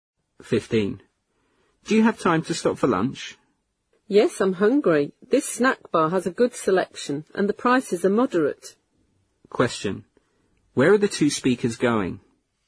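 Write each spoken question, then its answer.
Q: Where are the 2 speakers going?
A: To a snack bar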